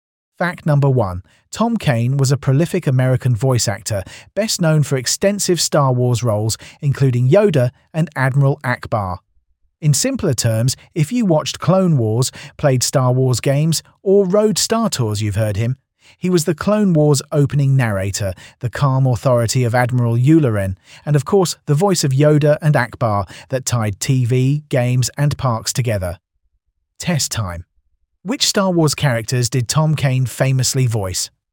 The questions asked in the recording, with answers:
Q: Which Star Wars characters did Tom Kane famously voice?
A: Correct answer, Yoda and Admiral Akbar.